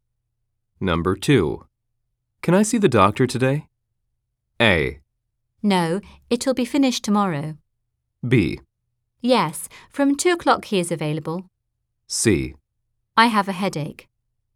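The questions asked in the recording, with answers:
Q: Can I see the doctor today?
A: B: Yes, from 2 o'clock he is available.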